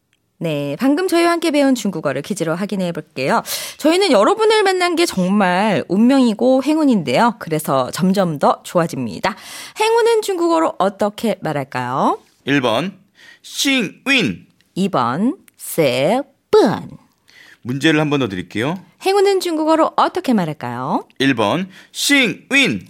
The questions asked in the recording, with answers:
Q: 행운은 중국어로 어떻게 말할까요?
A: 정답은요, 1번 싱운.